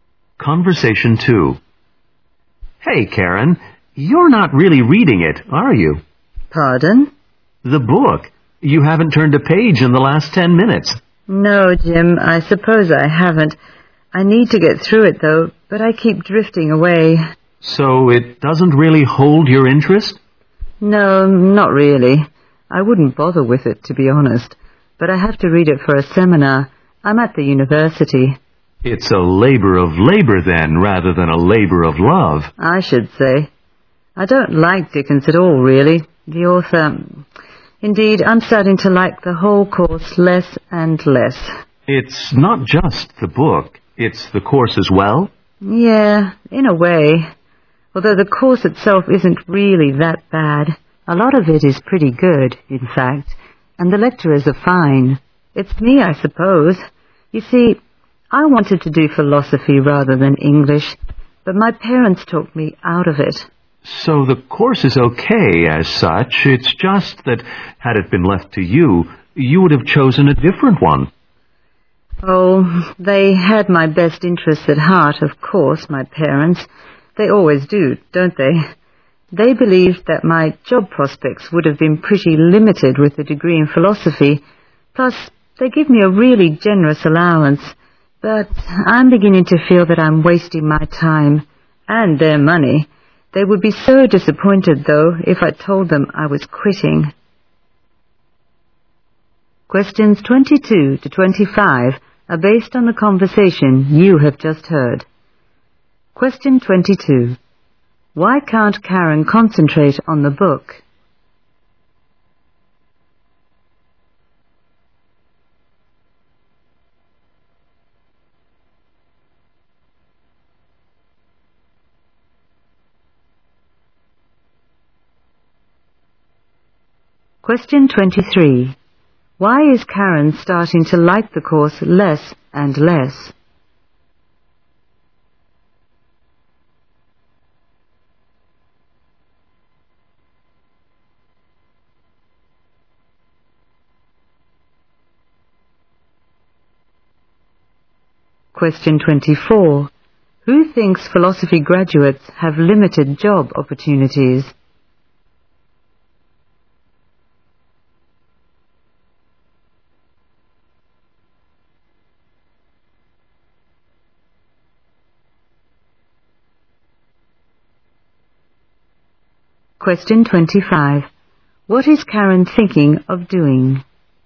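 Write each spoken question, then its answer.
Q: Why can't Karen concentrate on the book?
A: She isn't interested in it.

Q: Why is Karen starting to like the course less and less?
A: She wanted to study philosophy, not English.

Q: Who thinks philosophy graduates have limited job opportunities?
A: Karen's parents.

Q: What is Karen thinking of doing?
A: Quitting the course.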